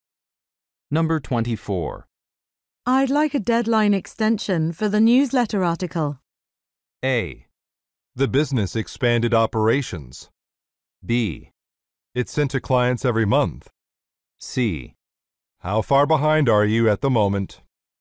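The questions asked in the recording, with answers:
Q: I'd like a deadline extension for the newsletter article.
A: C: How far behind are you at the moment?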